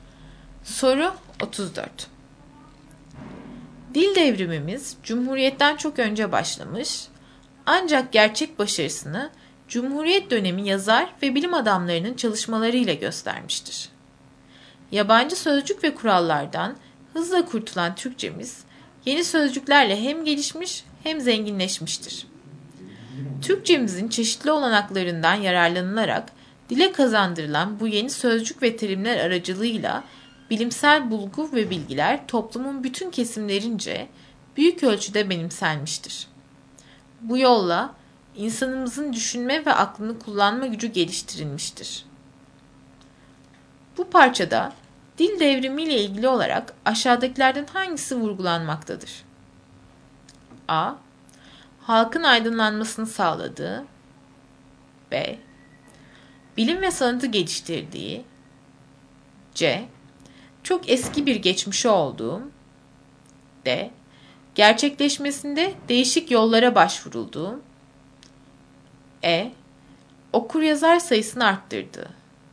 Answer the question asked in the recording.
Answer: Doğru cevap A.